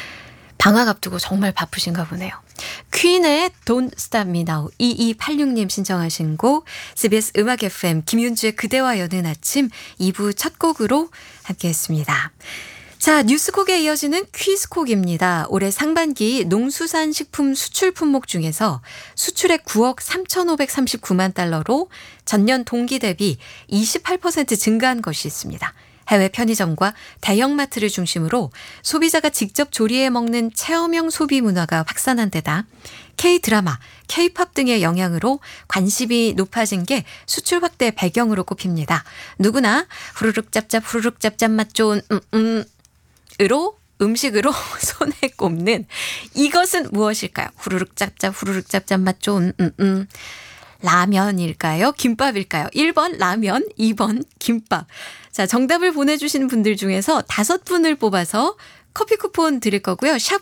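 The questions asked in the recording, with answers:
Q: 누구나 후루룩 짭짭 후루룩 짭짭 맛 좋은 으로 음식으로 손에 꼽는 이것은 무엇일까요?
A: 1: 라면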